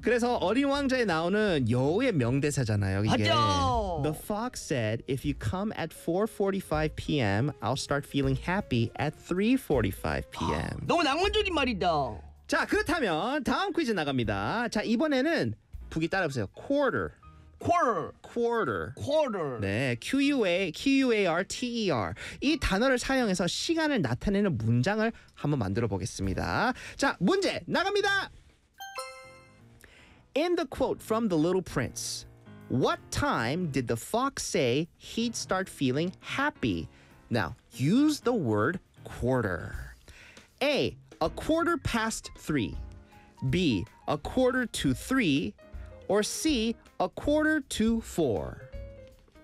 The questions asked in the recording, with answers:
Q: In the quote from The Little Prince, what time did the fox say he'd start feeling happy?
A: the fox said he'd start feeling happy at a quarter to four.